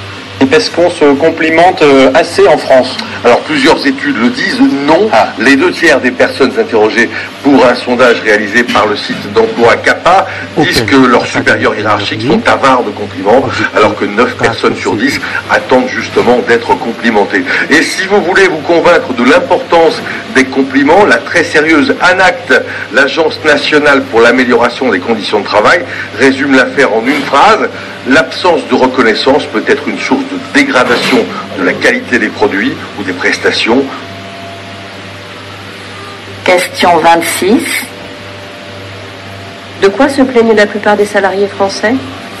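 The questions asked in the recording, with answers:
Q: De quoi se plaignent la plupart des salariés français ?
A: Leurs supérieurs hiérarchiques ne leur font pas assez de compliments.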